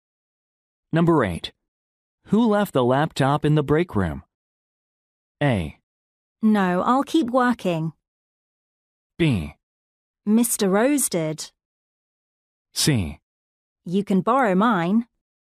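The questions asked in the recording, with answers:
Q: Who left the laptop in the break room?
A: B: Mr. Rose did.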